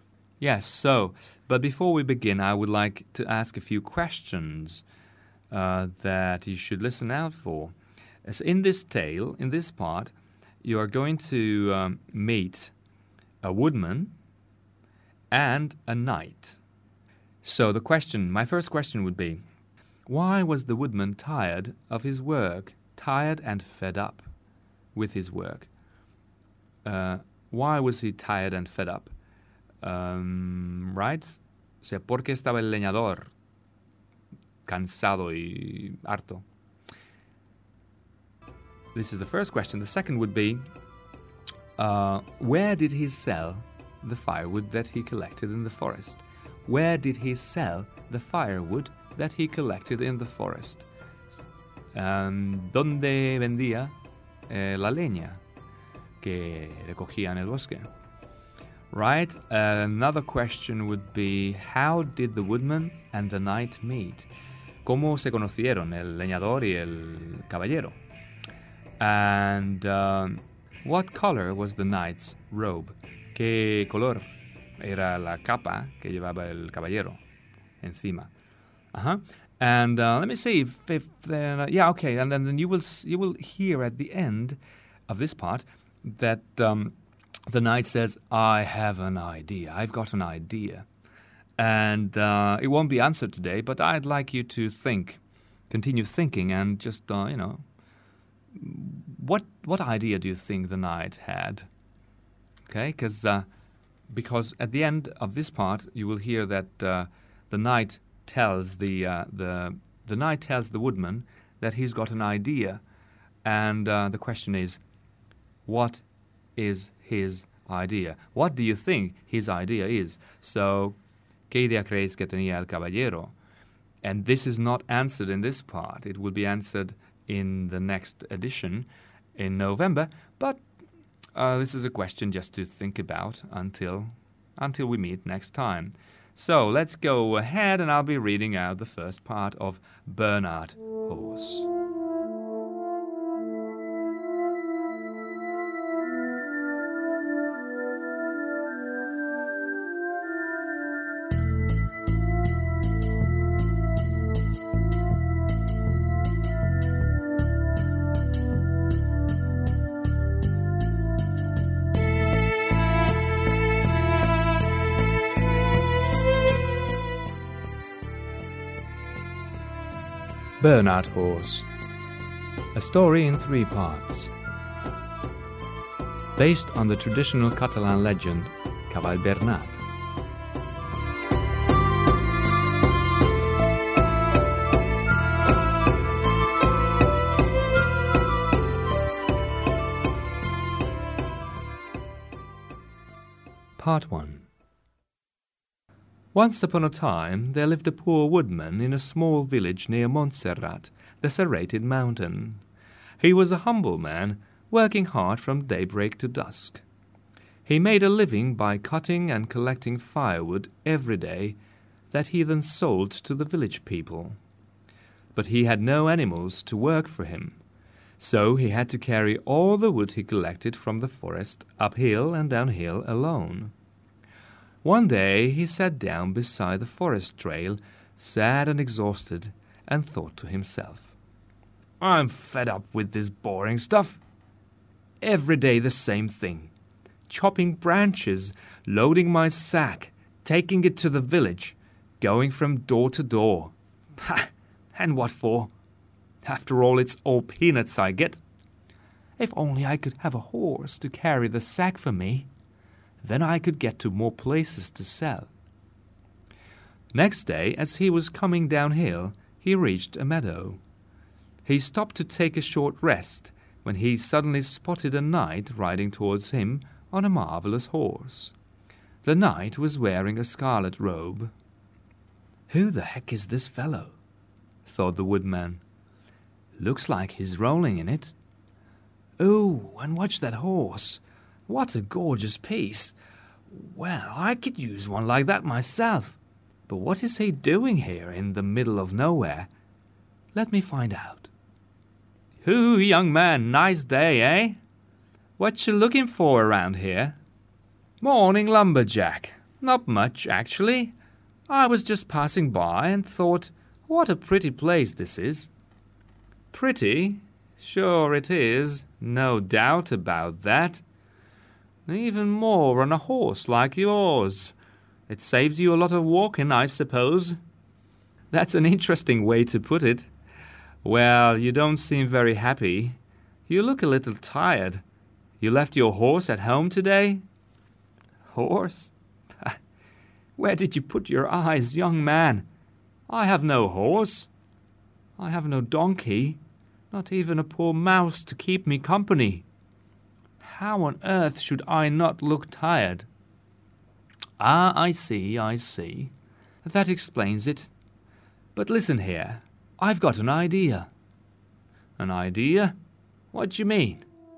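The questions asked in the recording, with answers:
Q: why was the woodman tired of his work, tired and fed up with his work?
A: He had no animals, so he had to carry all the wood uphill and downhill alone every day, and he earned very little

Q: where did he sell the firewood that he collected in the forest?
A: In the village, from door to door

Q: how did the woodman and the knight meet?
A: The woodman was resting in a meadow when the knight rode towards him on a horse

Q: And what color was the knight's robe?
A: Scarlet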